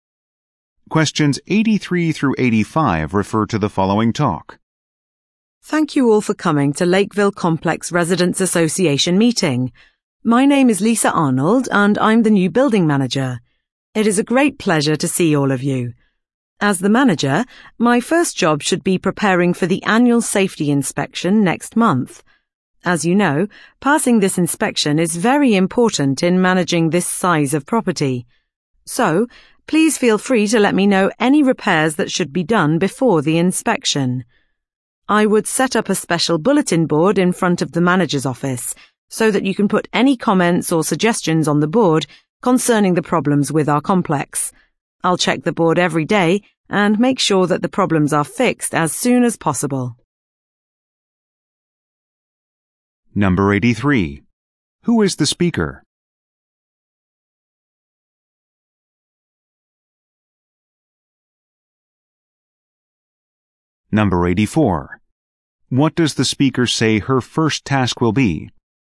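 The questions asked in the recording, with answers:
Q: Who is the speaker?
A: The new building manager

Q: What does the speaker say her first task will be?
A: Preparing for the annual safety inspection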